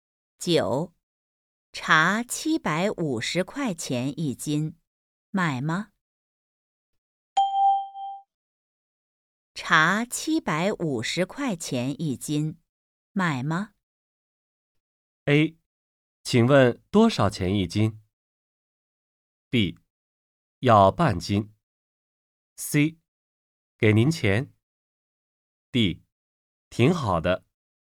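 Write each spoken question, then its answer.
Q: 茶750块钱一斤,买吗?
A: B: 要半斤。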